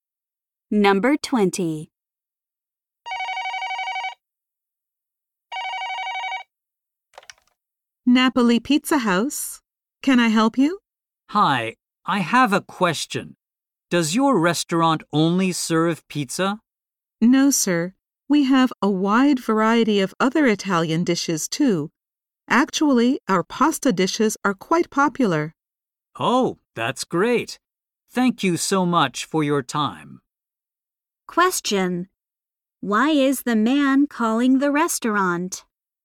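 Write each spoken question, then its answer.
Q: Why is the man calling the restaurant?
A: To ask whether the restaurant serves only pizza.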